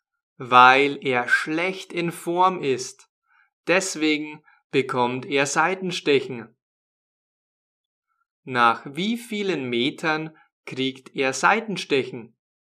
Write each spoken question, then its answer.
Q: wie vielen Metern kriegt er Seitenstechen?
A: nach 200.